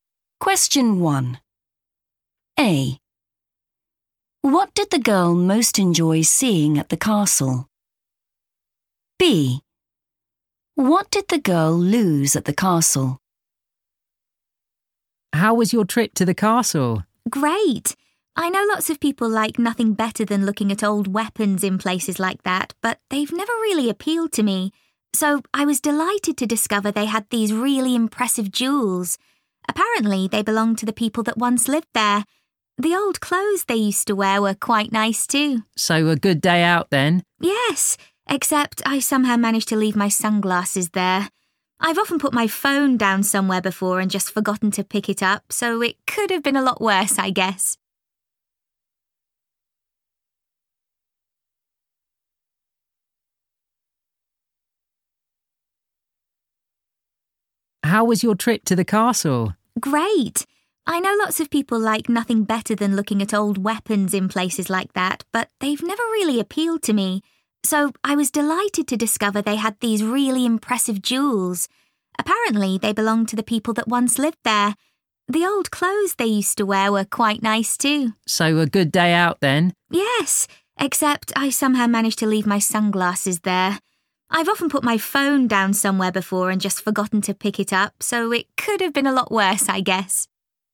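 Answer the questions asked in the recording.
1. jewels
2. sunglasses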